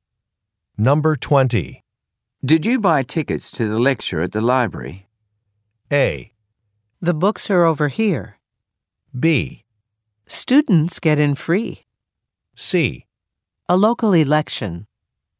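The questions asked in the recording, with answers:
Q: Did you buy tickets to the lecture at the library?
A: B: Students get in free.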